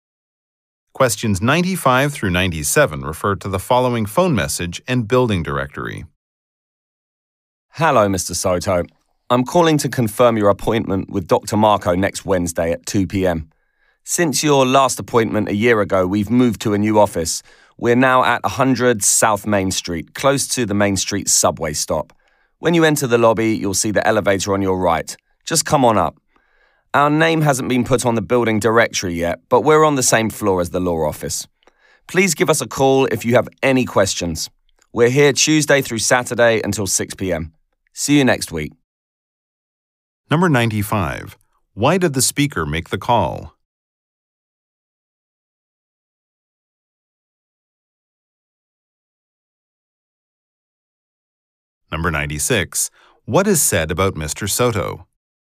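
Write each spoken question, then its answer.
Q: Why did the speaker make the call?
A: To confirm an appointment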